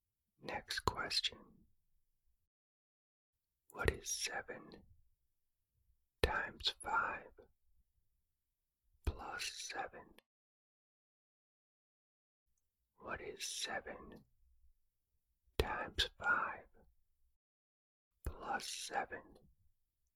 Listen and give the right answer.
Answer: The answer is 42.